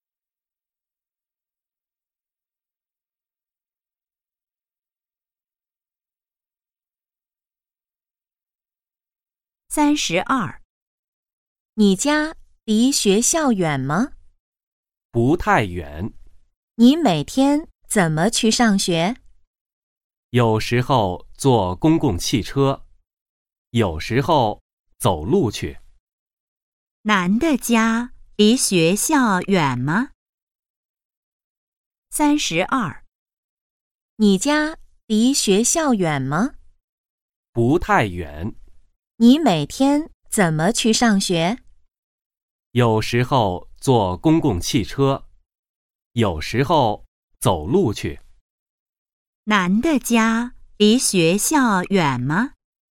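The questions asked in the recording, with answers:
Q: 男的家离学校远吗?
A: 不太远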